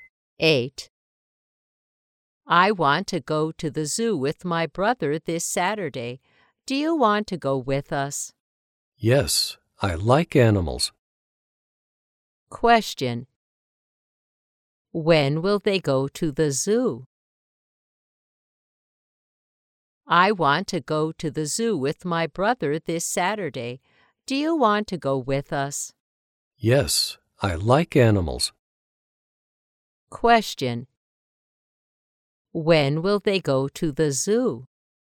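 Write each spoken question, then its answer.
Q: When will they go to the zoo?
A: This Saturday.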